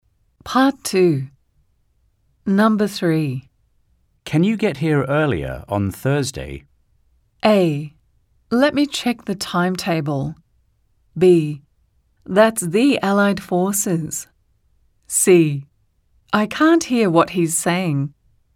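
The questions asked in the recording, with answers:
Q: Can you get here earlier on Thursday?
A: A: Let me check the timetable.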